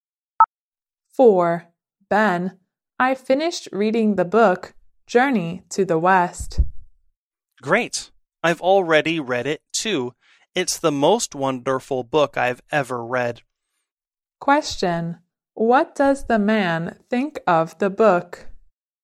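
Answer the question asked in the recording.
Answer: It's the most wonderful book he's ever read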